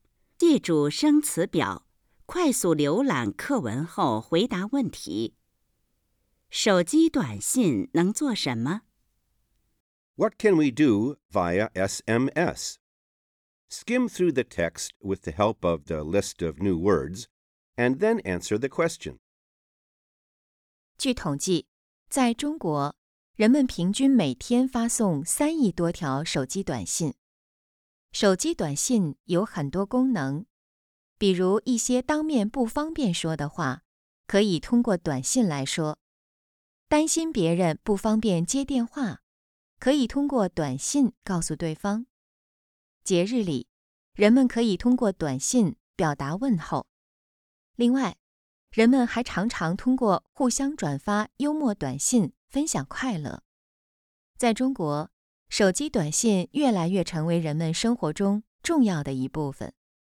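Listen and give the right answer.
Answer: 说当面不方便说的话、通知不方便接电话的人、节日问候、转发幽默短信分享快乐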